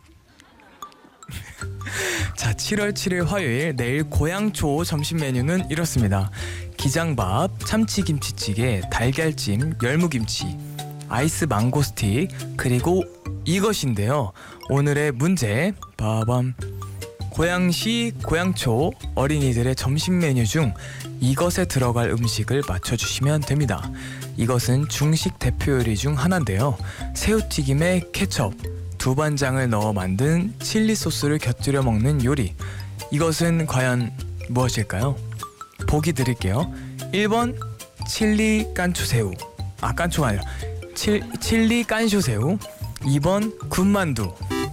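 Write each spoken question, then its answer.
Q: 고양시, 고양초 어린이들의 점심 메뉴 중 이것에 들어갈 음식을 맞춰주시면 됩니다.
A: 1: 칠리 깐쇼새우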